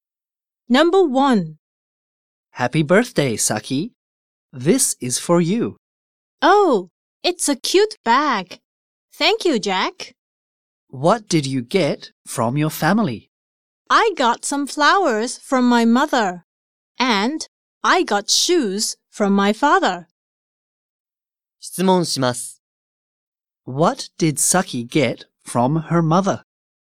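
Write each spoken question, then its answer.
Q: What did Saki get from her mother?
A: Some flowers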